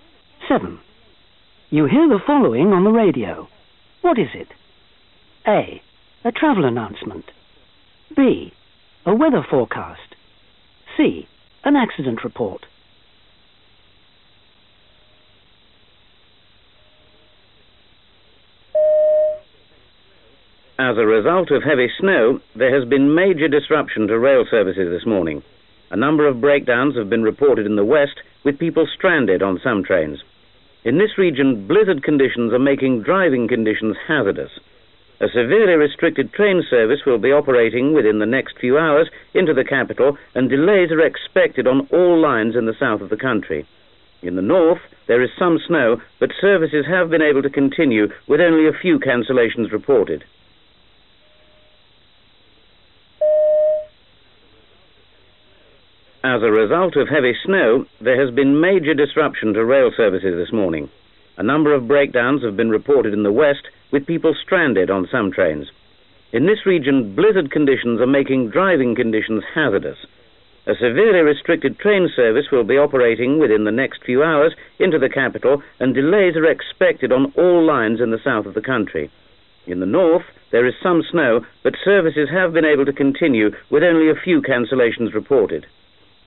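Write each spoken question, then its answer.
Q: What is it? A. A travel announcement. B. A weather forecast. C. An accident report.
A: A: A travel announcement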